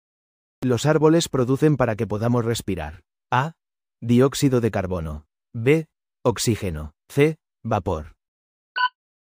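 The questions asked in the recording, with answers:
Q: Los árboles producen para que podamos respirar.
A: B: Oxígeno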